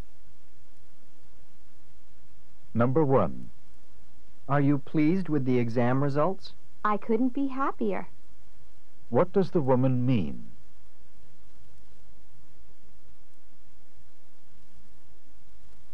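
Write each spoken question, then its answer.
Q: What does the woman mean?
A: She is extremely happy with the results.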